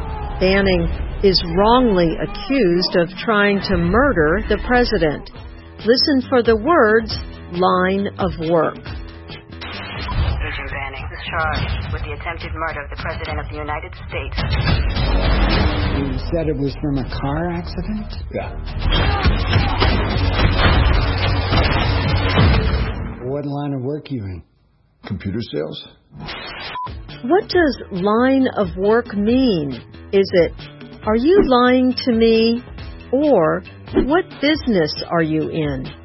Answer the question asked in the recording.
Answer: Line of work means the business you are in.